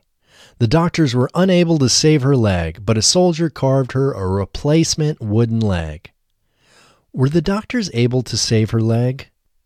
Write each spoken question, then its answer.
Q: Were the doctors able to save her leg?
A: No, the doctors were unable to save her leg.